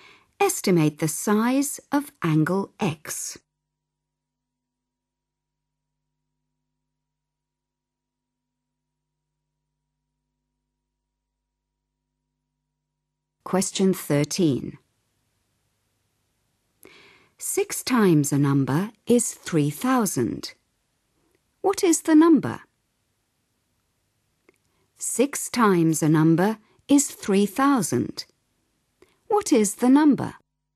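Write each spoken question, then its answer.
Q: What is the number?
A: 500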